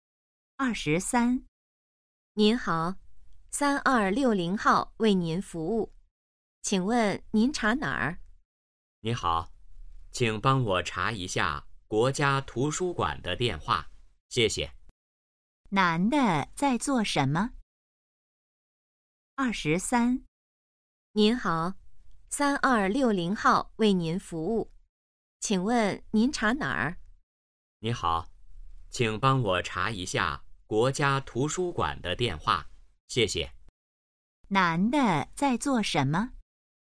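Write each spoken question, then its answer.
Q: 男的在做什么?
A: 打电话查国家图书馆的电话号码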